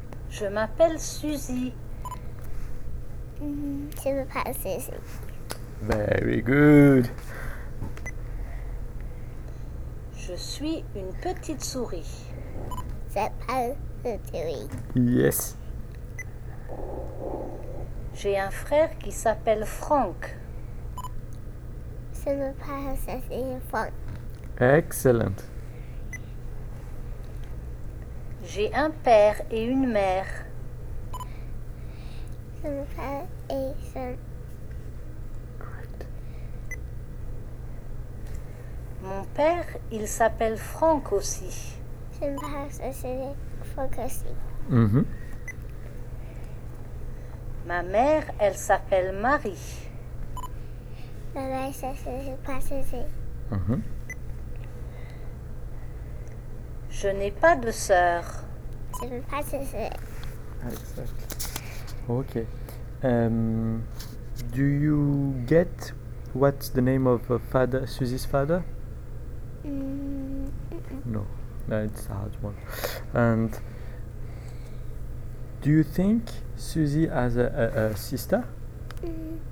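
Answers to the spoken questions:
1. Franck
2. No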